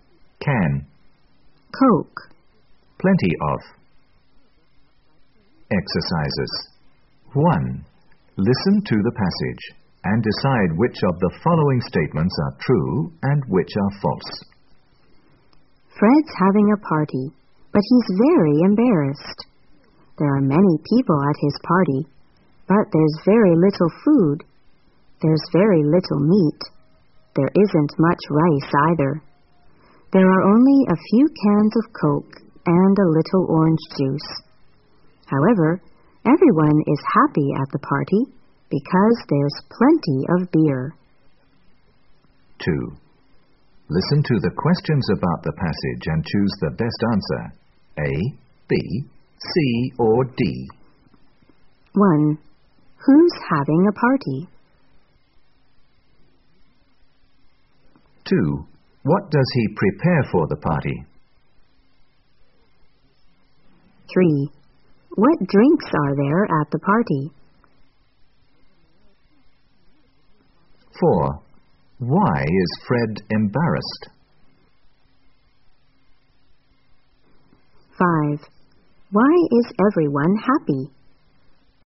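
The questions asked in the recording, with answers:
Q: Who's having a party?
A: Fred

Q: What does he prepare for the party?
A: A little meat, rice, a few cans of Coke, a little orange juice and plenty of beer

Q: What drinks are there at the party?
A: Coke, orange juice and beer

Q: Why is Fred embarrassed?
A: There are many people but very little food

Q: Why is everyone happy?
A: There's plenty of beer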